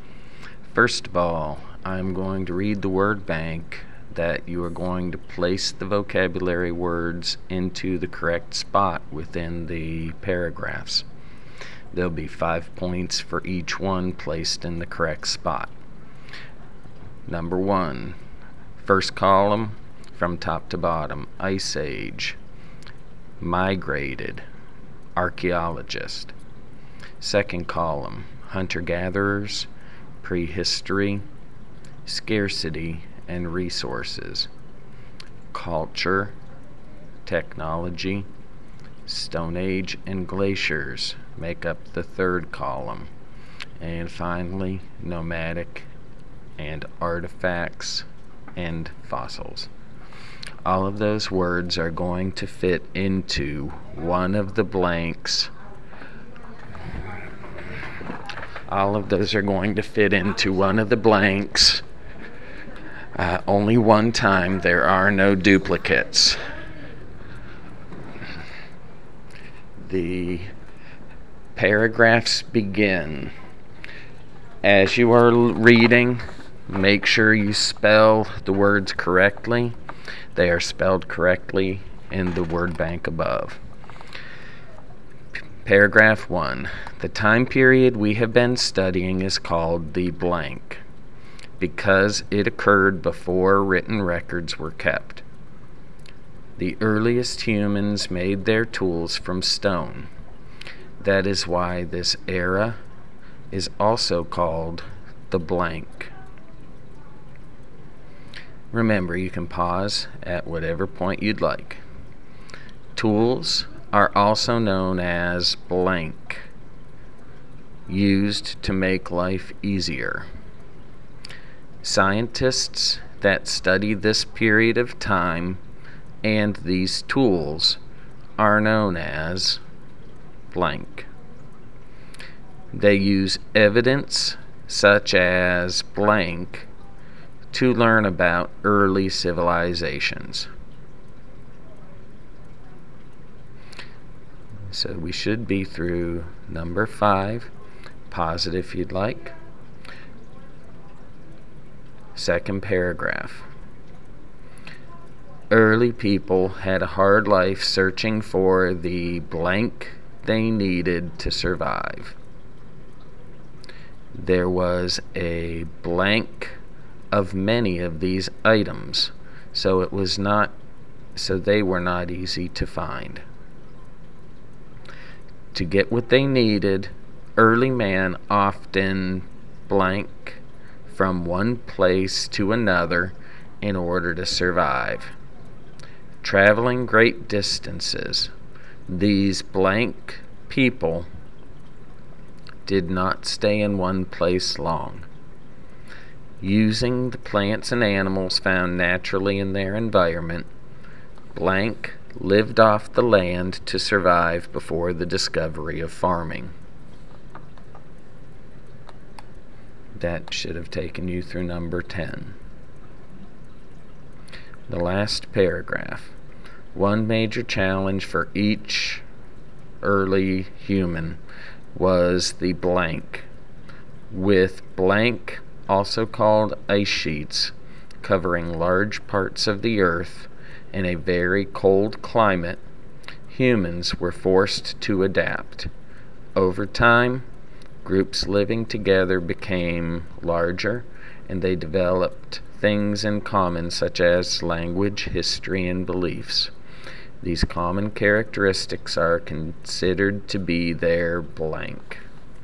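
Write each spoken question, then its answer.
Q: The time period we have been studying is called the blank because it occurred before written records were kept.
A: prehistory

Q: That is why this era is also called the blank.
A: Stone Age

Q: Tools are also known as blank, used to make life easier.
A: technology

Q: Scientists that study this period of time and these tools are known as blank.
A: archaeologists

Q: Early people had a hard life searching for the blank they needed to survive.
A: resources

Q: There was a blank of many of these items, so they were not easy to find.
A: scarcity

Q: To get what they needed, early man often blank from one place to another in order to survive.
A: migrated

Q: Traveling great distances, these blank people did not stay in one place long.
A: nomadic

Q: Using the plants and animals found naturally in their environment, blank lived off the land to survive before the discovery of farming.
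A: hunter-gatherers

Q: One major challenge for each early human was the blank.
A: Ice Age

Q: With blank, also called ice sheets, covering large parts of the earth in a very cold climate, humans were forced to adapt.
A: glaciers

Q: These common characteristics are considered to be their blank.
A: culture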